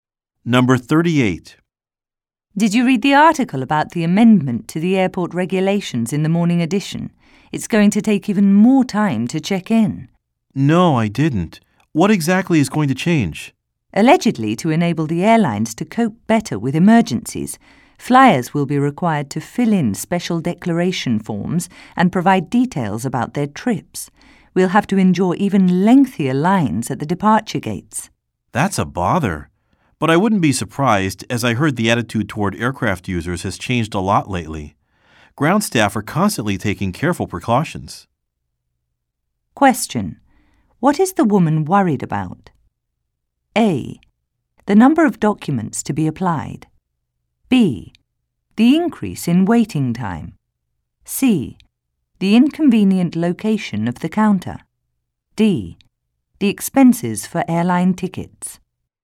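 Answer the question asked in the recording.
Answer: B: The increase in waiting time.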